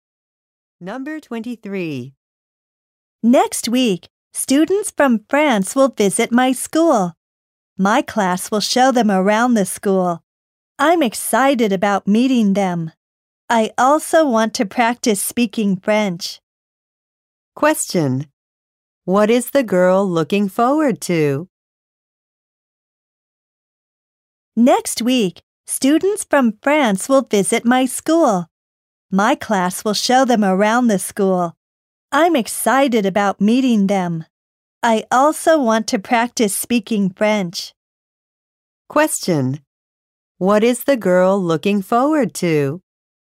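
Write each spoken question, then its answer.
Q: Question: What is the girl looking forward to?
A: Meeting students from France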